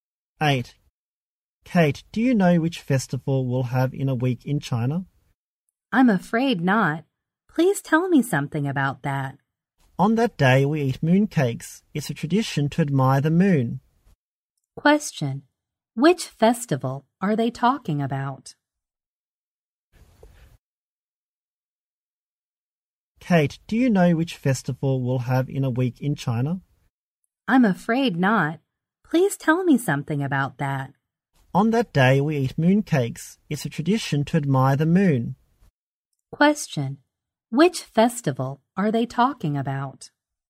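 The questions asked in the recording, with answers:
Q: which festival are they talking about?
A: The Mid-Autumn Festival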